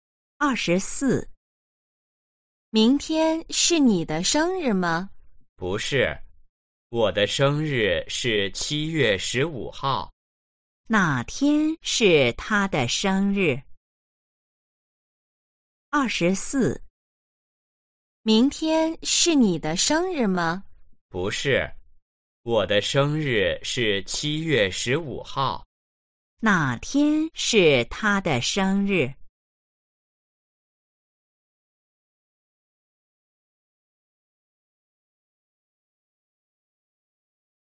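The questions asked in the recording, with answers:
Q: 哪天是他的生日?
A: 七月十五号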